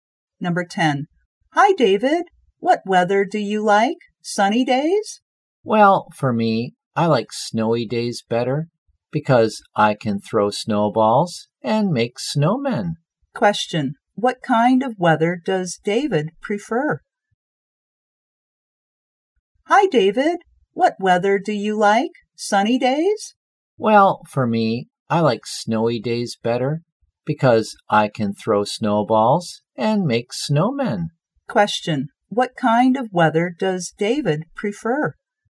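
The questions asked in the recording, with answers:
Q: What kind of weather does David prefer?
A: Snowy days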